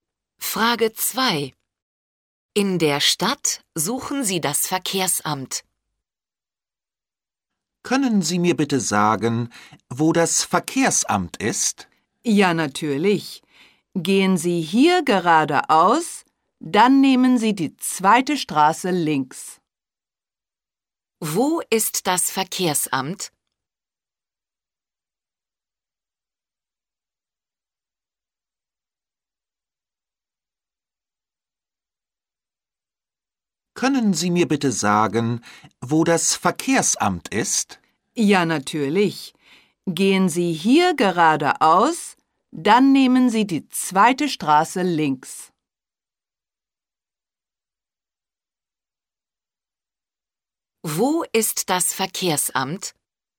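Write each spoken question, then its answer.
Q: Wo ist das Verkehrsamt?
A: Geradeaus, dann die zweite Straße links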